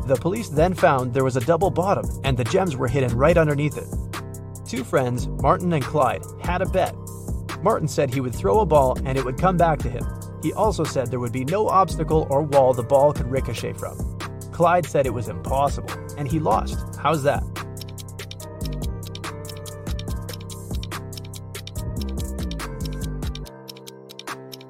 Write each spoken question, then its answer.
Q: How's that?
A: Martin threw the ball straight up.